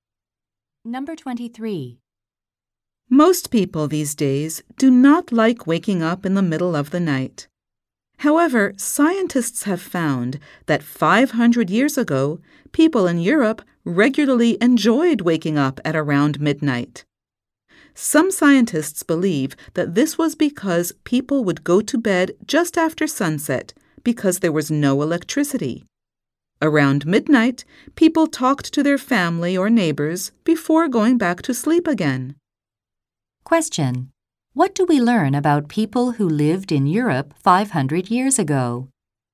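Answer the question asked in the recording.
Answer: They enjoyed waking up around midnight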